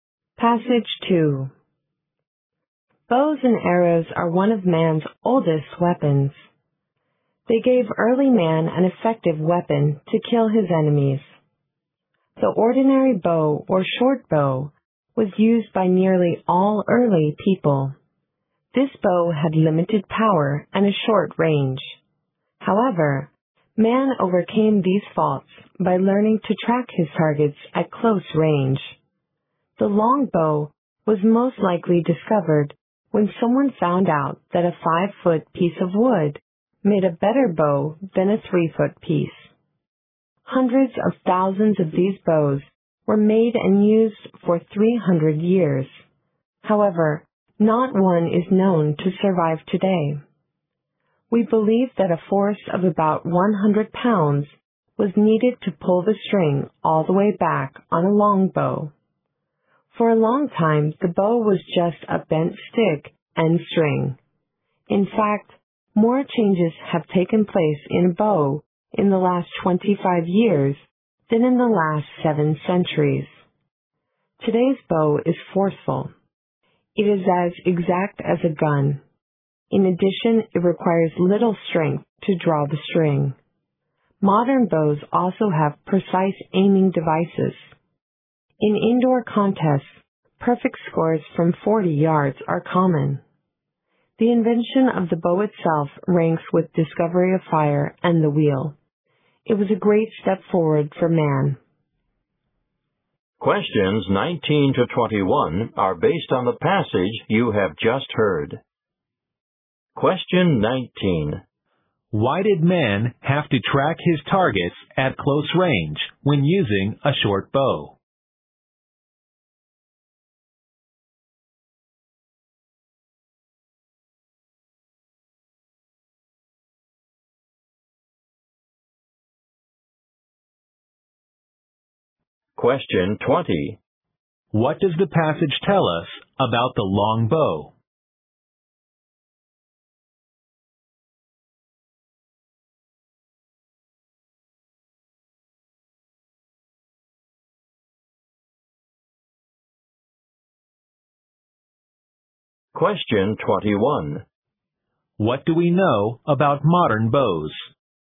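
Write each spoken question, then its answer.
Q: Why did man have to track his targets at close range when using a short bow?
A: The short bow had limited power and a short range.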